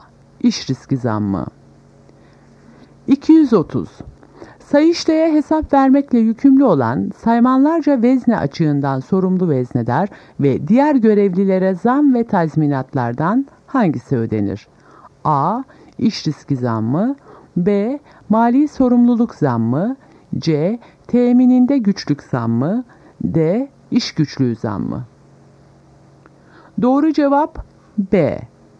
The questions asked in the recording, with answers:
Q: Sayıştay'a hesap vermekle yükümlü olan saymanlarca vezne açığından sorumlu veznedar ve diğer görevlilere zam ve tazminatlardan hangisi ödenir?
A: Doğru cevap B. Mali sorumluluk zammı.